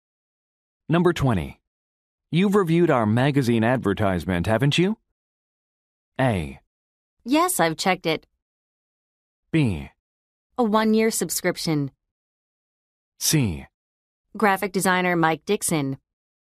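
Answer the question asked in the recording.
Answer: A: Yes, I've checked it.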